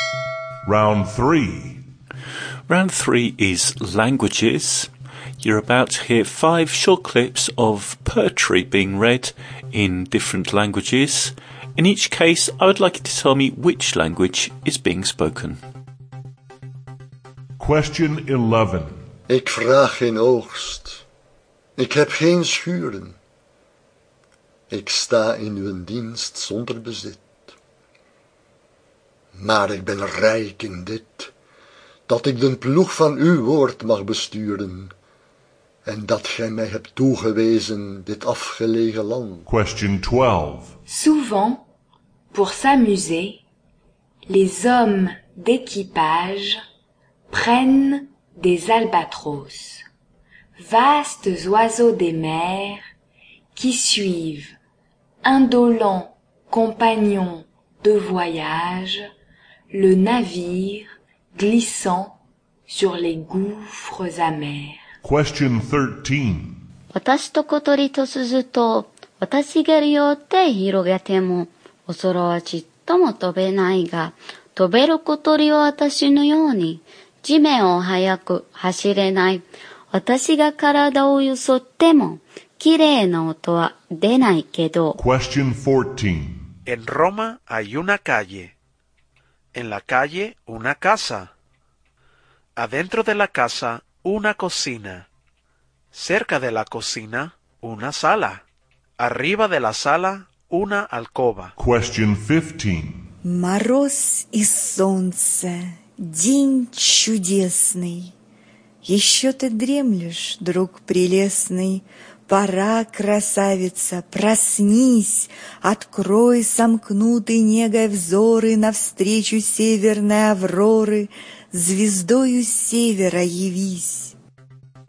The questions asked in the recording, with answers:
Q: In each case, I would like you to tell me which language is being spoken.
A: the answer to number 11 was Dutch.

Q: In each case, I would like you to tell me which language is being spoken.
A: Number 12 was French.

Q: In each case, I would like you to tell me which language is being spoken.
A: Number 13, Japanese.

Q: In each case, I would like you to tell me which language is being spoken.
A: Number 14 was Spanish.

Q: In each case, I would like you to tell me which language is being spoken.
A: And number 15, Russian.